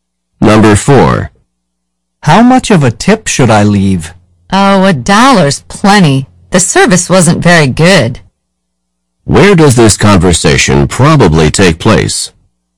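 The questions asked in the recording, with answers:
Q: Where does this conversation probably take place?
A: In a restaurant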